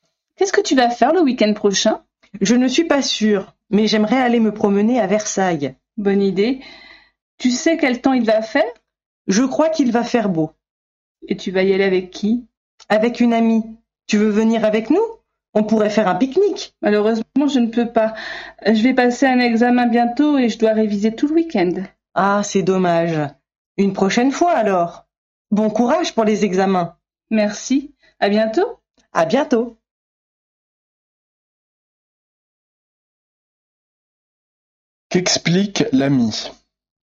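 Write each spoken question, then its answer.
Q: Qu'explique l'ami?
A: Il ne peut pas venir parce qu'il doit réviser pour un examen tout le week-end.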